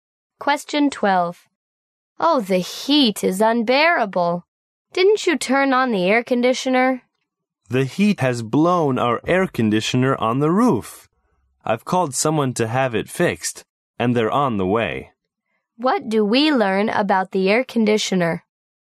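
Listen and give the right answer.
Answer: It is broken and is going to be repaired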